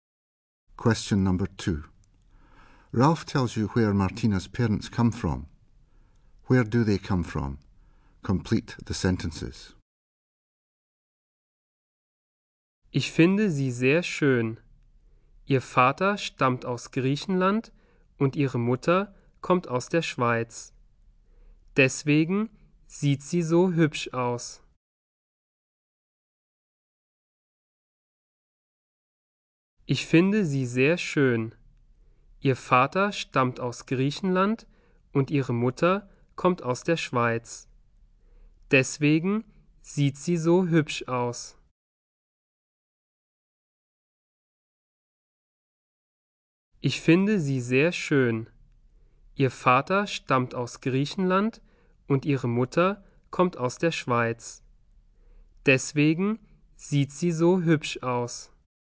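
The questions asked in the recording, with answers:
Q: Where do they come from?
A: Father from Greece, mother from Switzerland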